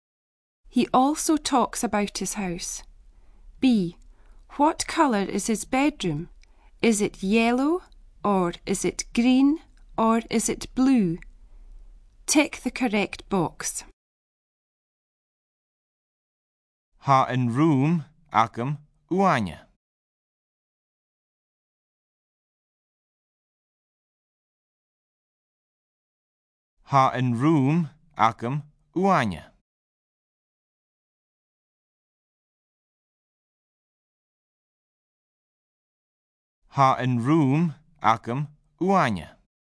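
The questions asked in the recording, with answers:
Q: What colour is his bedroom?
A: B: green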